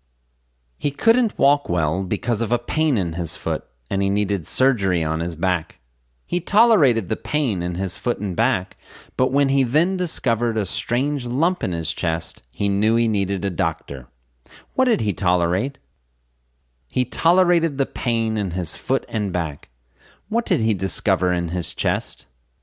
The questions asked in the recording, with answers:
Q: What did he discover in his chest?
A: He discovered a strange lump in his chest.